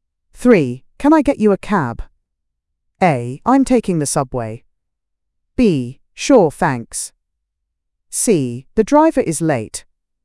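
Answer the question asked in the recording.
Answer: B: Sure, thanks.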